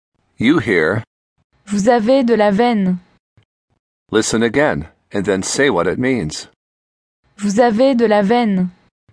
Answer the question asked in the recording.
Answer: You are lucky.